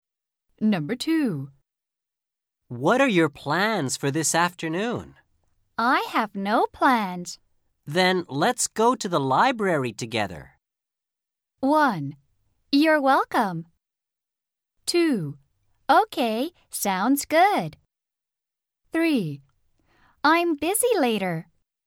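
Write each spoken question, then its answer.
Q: Then let's go to the library together.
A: 2: Okay, sounds good.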